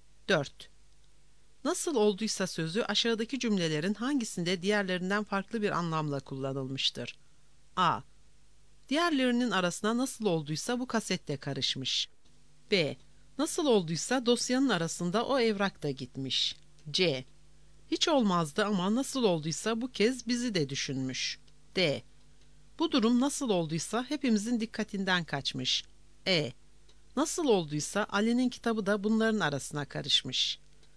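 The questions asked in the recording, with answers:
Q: Nasıl olduysa sözü aşağıdaki cümlelerin hangisinde diğerlerinden farklı bir anlamla kullanılmıştır?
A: C: Hiç olmazdı ama nasıl olduysa bu kez bizi de düşünmüş.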